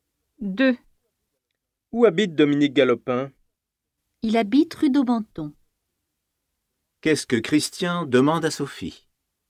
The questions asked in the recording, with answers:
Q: Qu'est-ce que Christian demande à Sophie?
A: Il lui demande où habite Dominique Galopin.